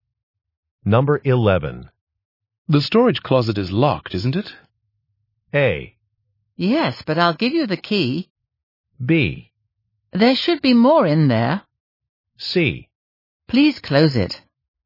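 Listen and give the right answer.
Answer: A: Yes, but I'll give you the key.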